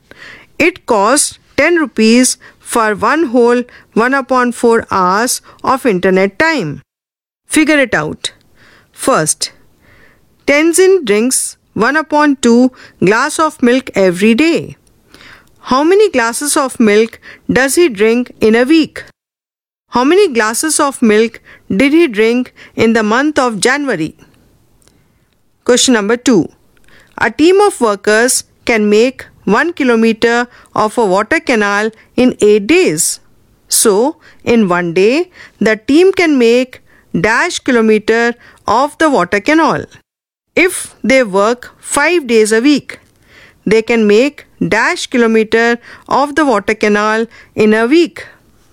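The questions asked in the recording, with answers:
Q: How many glasses of milk does he drink in a week?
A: 7/2 glasses (3 1/2)

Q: How many glasses of milk did he drink in the month of January?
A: 31/2 glasses (15 1/2)

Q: So, in 1 day, the team can make dash kilometer of the water canal.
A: 1/8 kilometer

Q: If they work 5 days a week, they can make dash kilometer of the water canal in a week.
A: 5/8 kilometer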